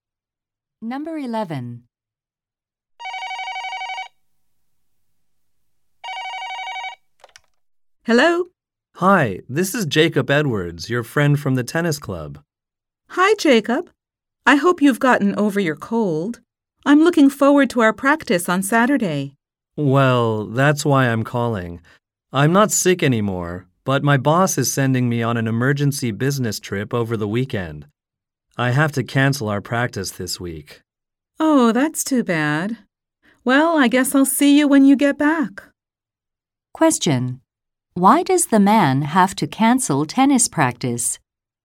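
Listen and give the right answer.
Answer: He must go on an emergency business trip.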